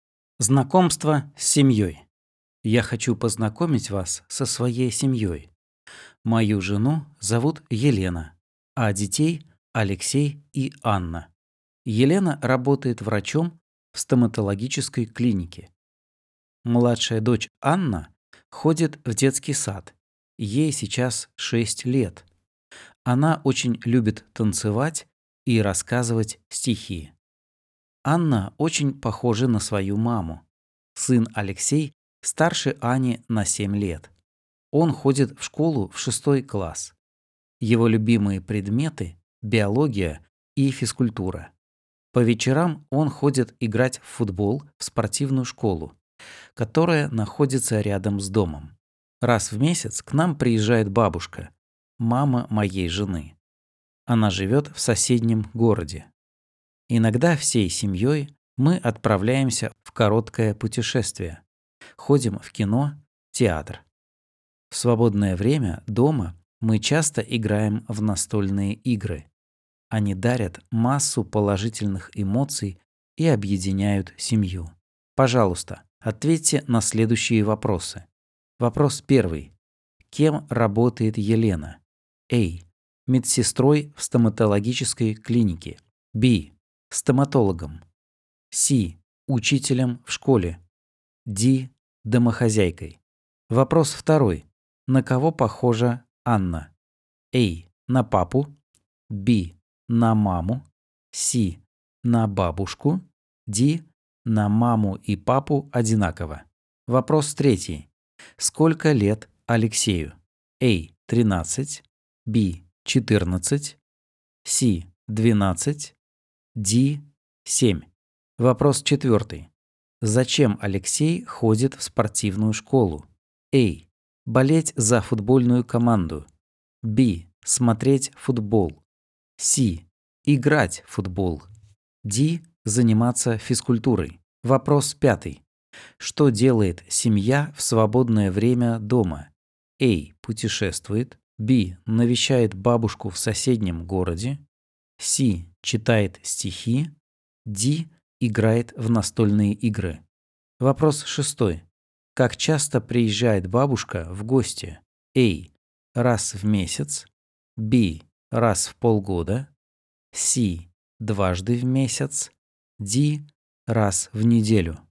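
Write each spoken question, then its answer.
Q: Кем работает Елена?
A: B: Стоматологом.

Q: На кого похожа Анна?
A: B: На маму.

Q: Сколько лет Алексею?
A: A: 13.

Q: Зачем Алексей ходит в спортивную школу?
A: C: Играть в футбол.

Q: Что делает семья в свободное время дома?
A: D: Играет в настольные игры.

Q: Как часто приезжает бабушка в гости?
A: A: Раз в месяц.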